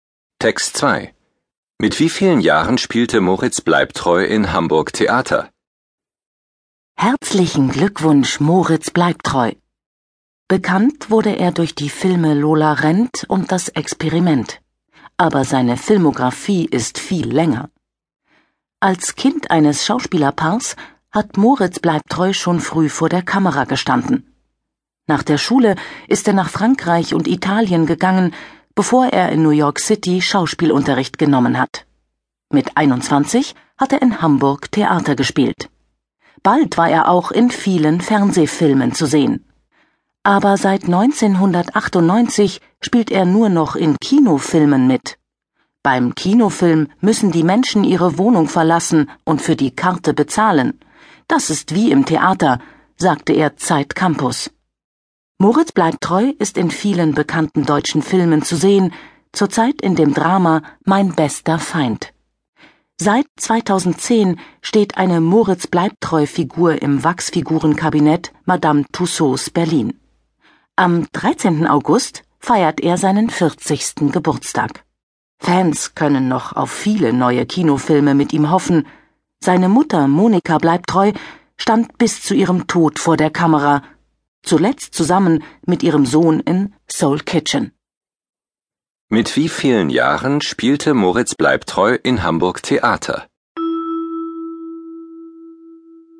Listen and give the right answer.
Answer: Mit 21 Jahren.